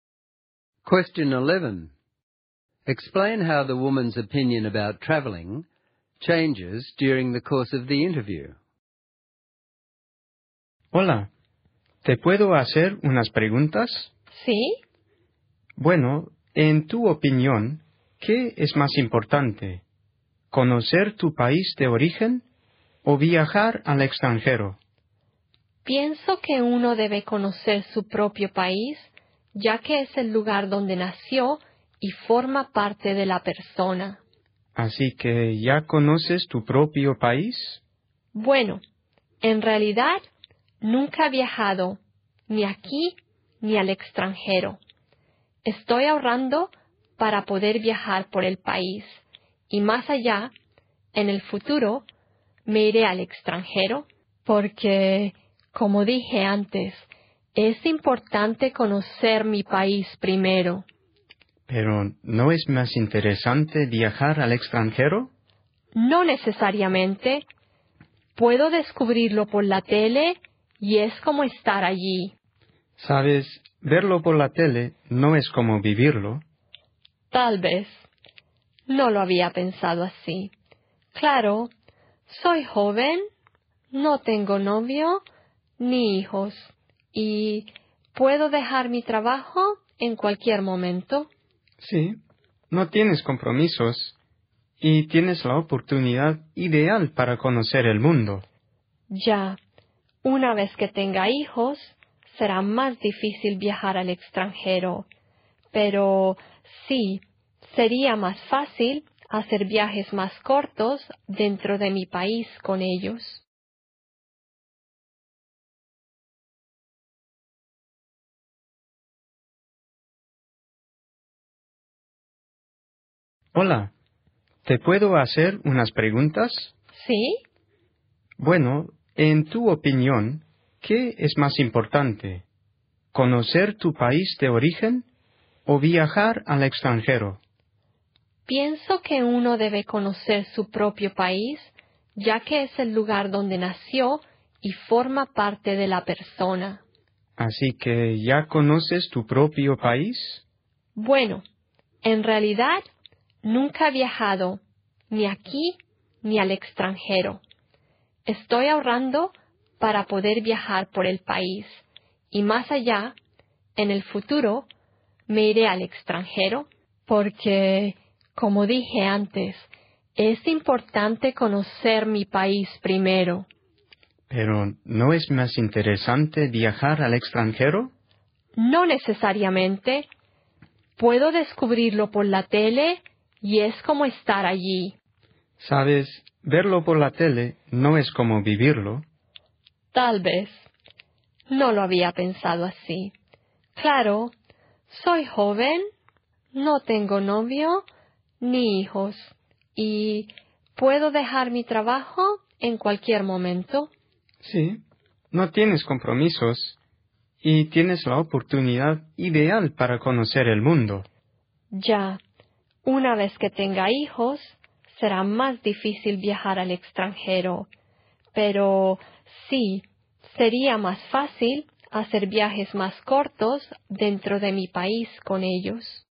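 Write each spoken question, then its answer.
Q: Explain how the woman's opinion about traveling changes during the course of the interview.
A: At first she thinks getting to know her own country first matters more and that TV is enough for abroad; later she agrees that while young and free she should travel abroad, and can take short trips at home later with children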